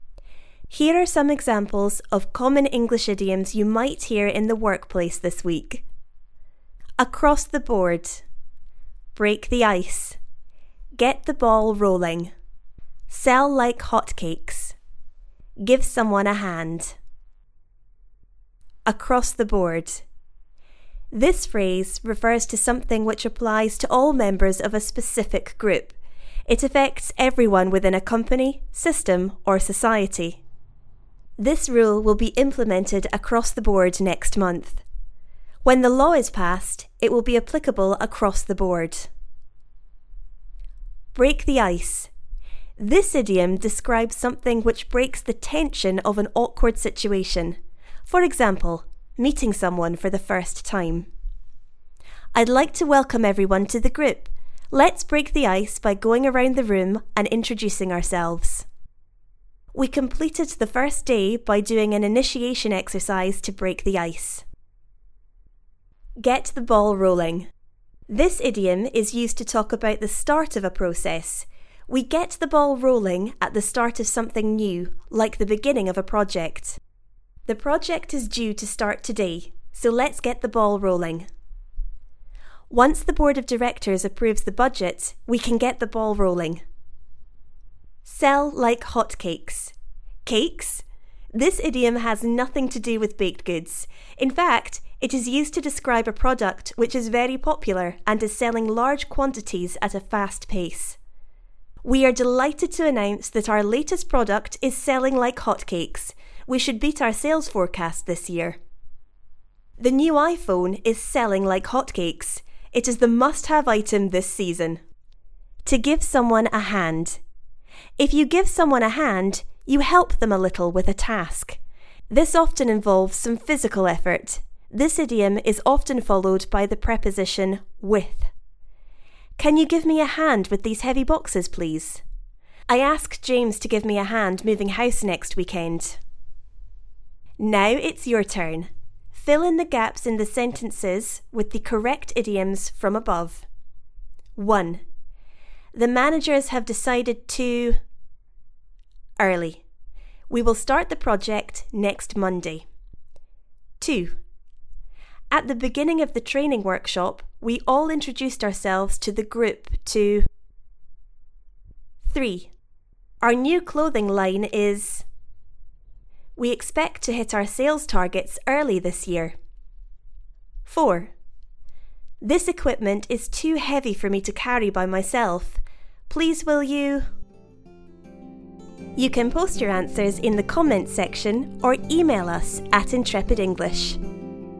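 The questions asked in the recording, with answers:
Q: The managers have decided to... early. We will start the project next Monday.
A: get the ball rolling

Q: At the beginning of the training workshop, we all introduced ourselves to the group to...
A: break the ice

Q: Our new clothing line is... We expect to hit our sales targets early this year.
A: selling like hotcakes

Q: This equipment is too heavy for me to carry by myself. Please will you...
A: give me a hand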